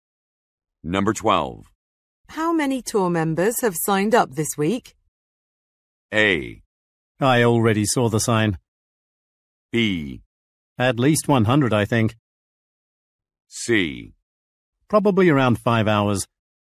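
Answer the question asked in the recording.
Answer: B: At least 100, I think.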